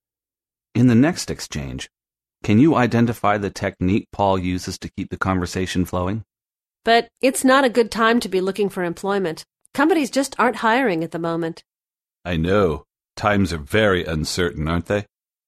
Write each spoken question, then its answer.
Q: In the next exchange, can you identify the technique Paul uses to keep the conversation flowing?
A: Well, he uses two techniques. First, he agrees with Nancy. He says, I know, and then he rephrases what she has just said.